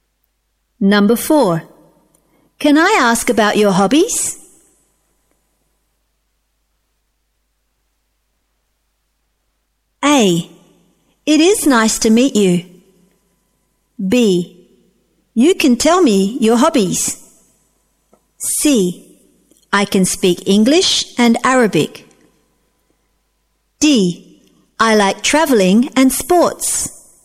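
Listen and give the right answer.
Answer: D: I like traveling and sports.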